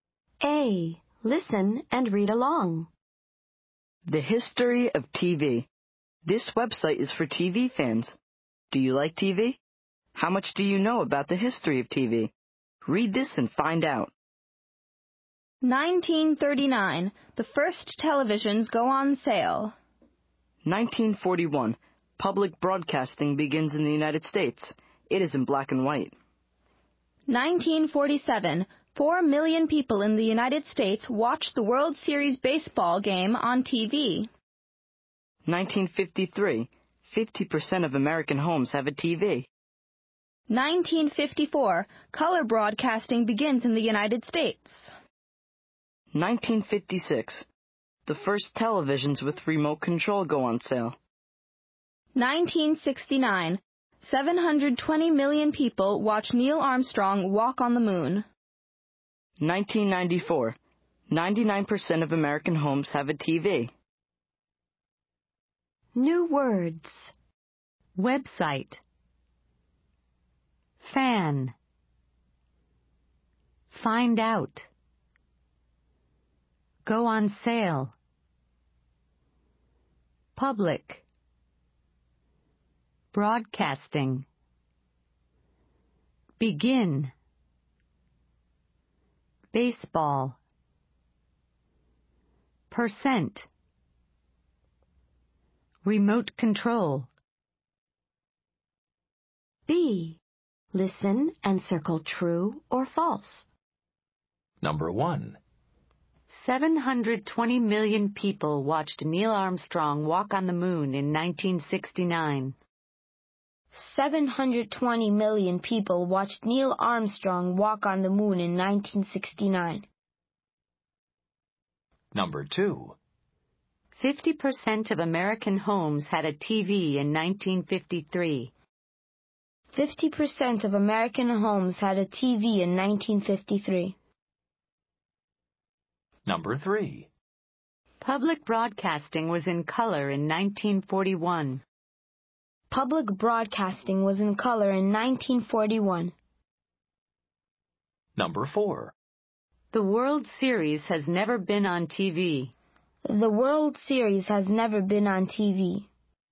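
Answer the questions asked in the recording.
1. True
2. True
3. False
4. False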